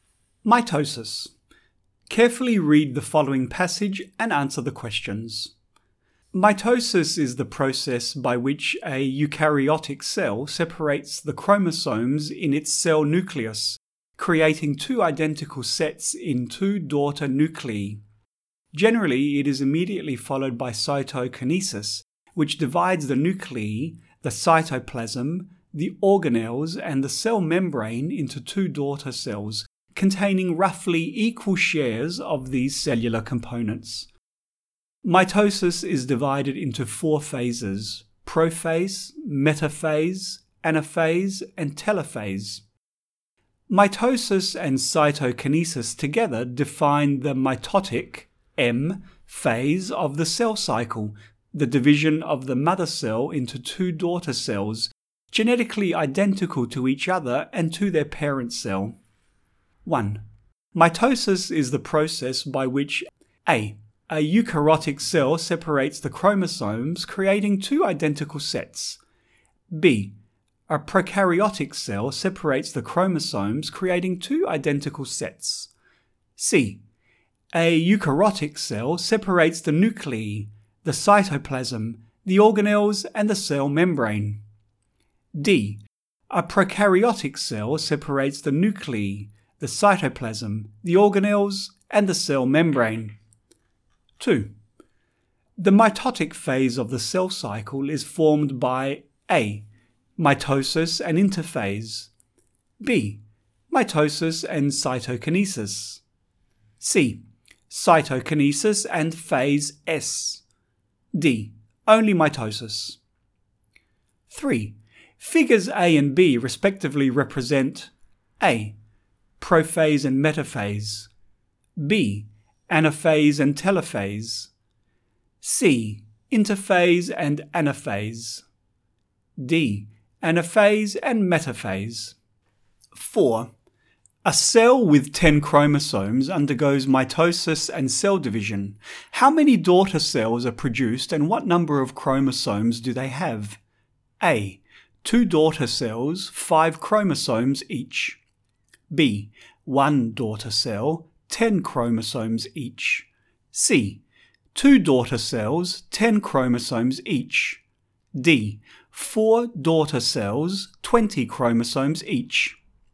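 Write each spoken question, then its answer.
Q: The mitotic phase of the cell cycle is formed by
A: B: Mitosis and cytokinesis

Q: A cell with 10 chromosomes undergoes mitosis and cell division. How many daughter cells are produced and what number of chromosomes do they have?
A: C: 2 daughter cells, 10 chromosomes each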